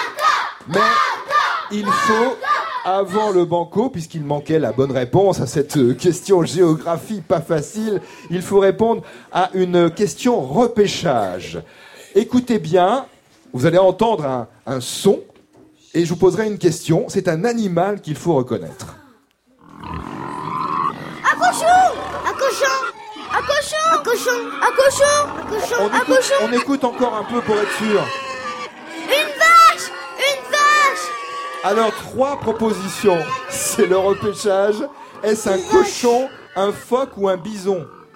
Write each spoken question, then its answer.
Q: Est-ce un cochon, un phoque ou un bison ?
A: Un cochon, un cochon,